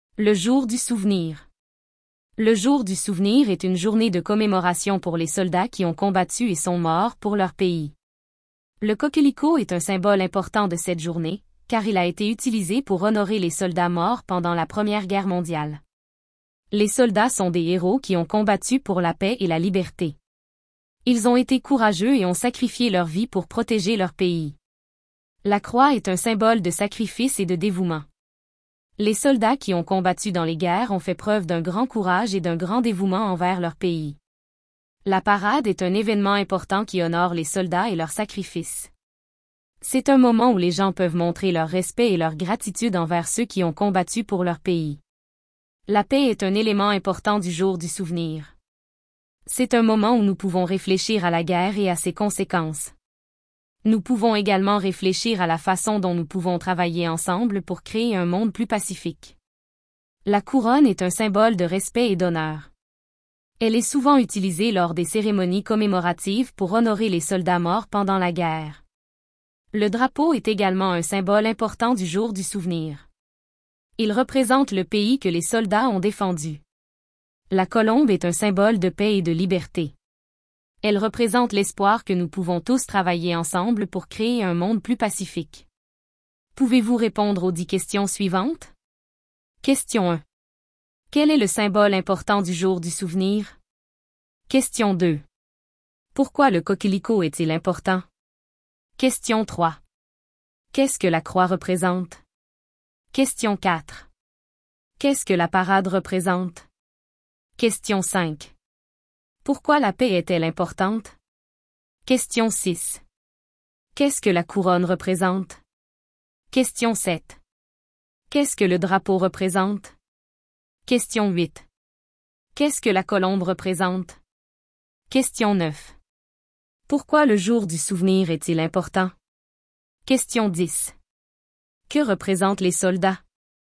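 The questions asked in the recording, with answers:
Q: Quel est le symbole important du jour du souvenir?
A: Le coquelicot

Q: Pourquoi le coquelicot est-il important?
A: Il a été utilisé pour honorer les soldats morts pendant la Première Guerre mondiale

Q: Qu'est-ce que la croix représente?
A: Le sacrifice et le dévouement

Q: Qu'est-ce que la parade représente?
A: Un événement qui honore les soldats et leurs sacrifices

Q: Qu'est-ce que la couronne représente?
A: Le respect et l'honneur

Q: Qu'est-ce que le drapeau représente?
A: Le pays que les soldats ont défendu

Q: Qu'est-ce que la colombe représente?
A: La paix et la liberté

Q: Pourquoi le jour du souvenir est-il important?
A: Il commémore les soldats qui ont combattu et sont morts pour leur pays

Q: Que représentent les soldats?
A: Des héros qui ont combattu pour la paix et la liberté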